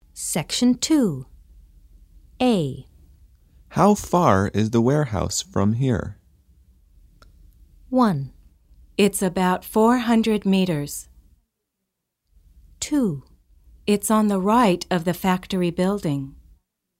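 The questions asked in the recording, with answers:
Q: How far is the warehouse from here?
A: 1: It's about 400 meters.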